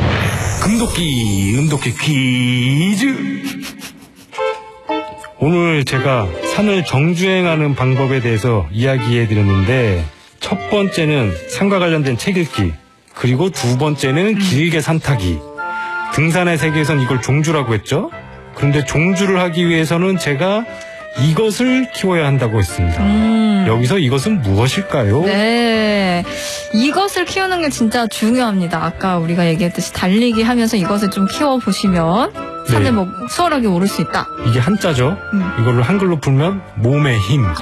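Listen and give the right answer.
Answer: 체력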